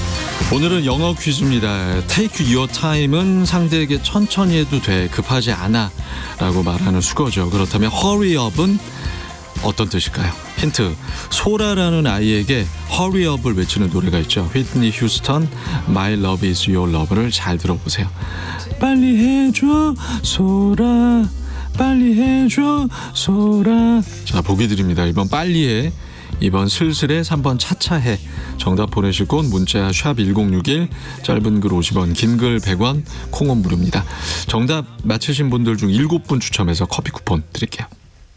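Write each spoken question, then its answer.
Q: 그렇다면 hurry up은 어떤 뜻일까요?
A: 1: 빨리 해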